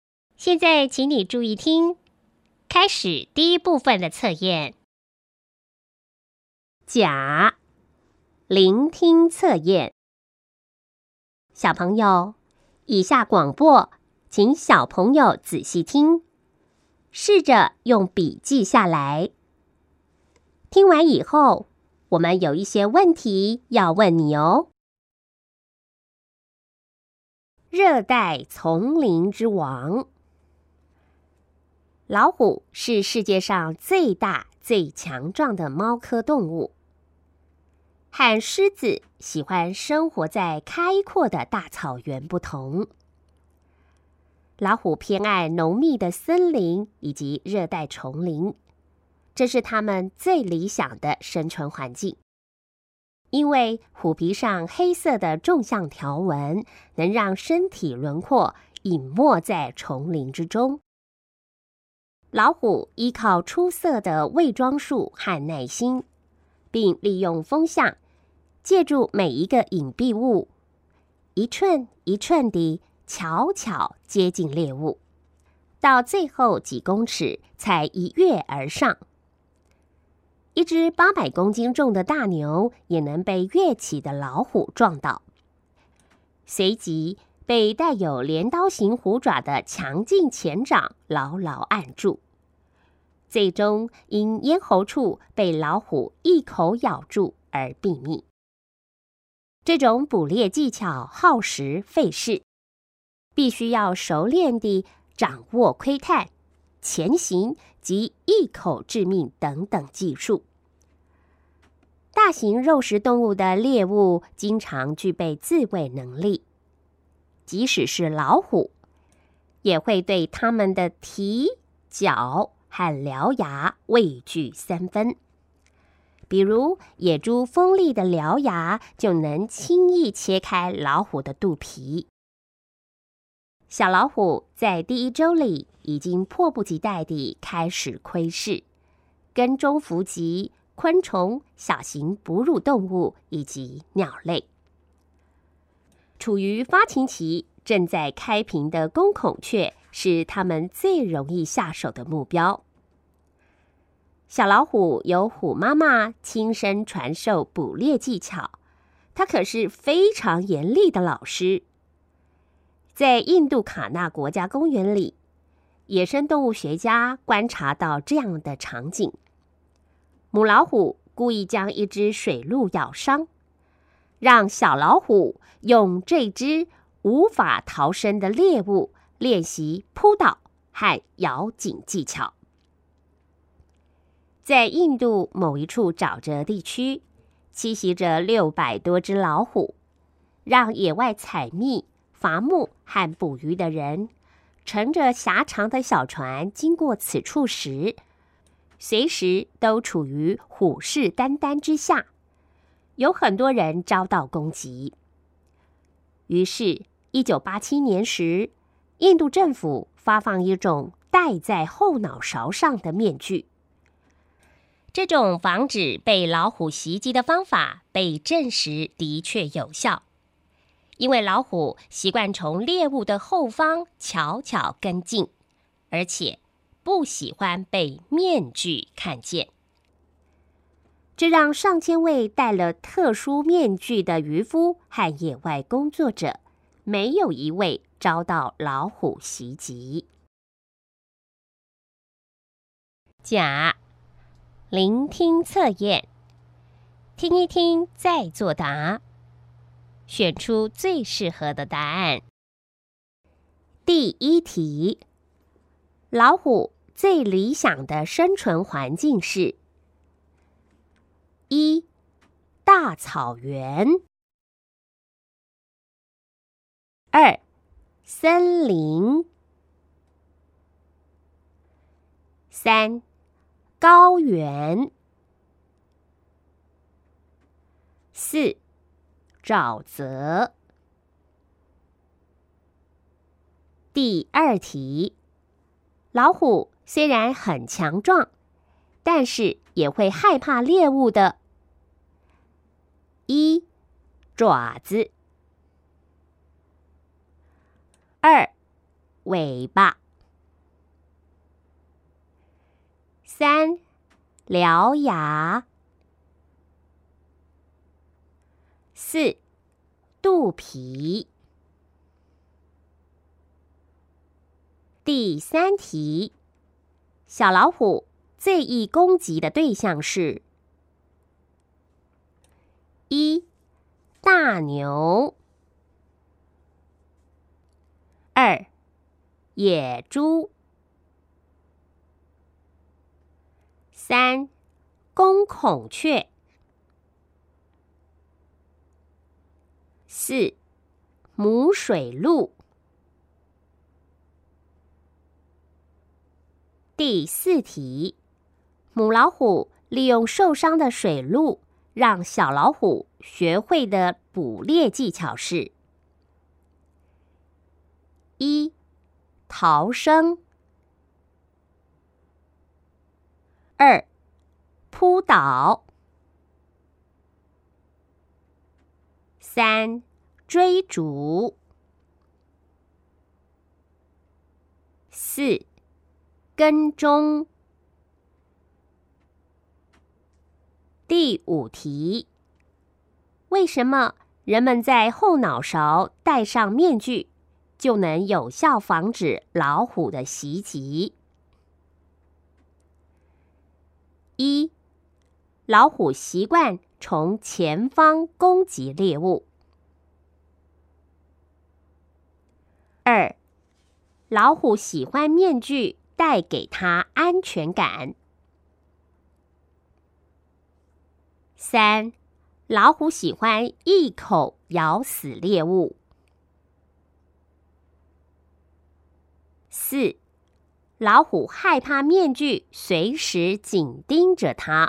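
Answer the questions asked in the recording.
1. 二: 森林
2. 三: 獠牙
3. 三: 公孔雀
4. 二: 扑倒
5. 四: 老虎害怕面具随时紧盯着他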